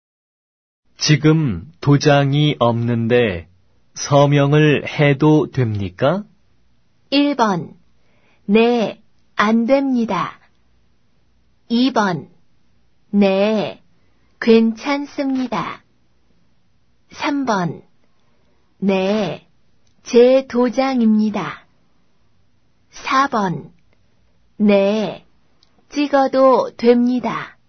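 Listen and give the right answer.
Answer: 2: 네, 괜찮습니다.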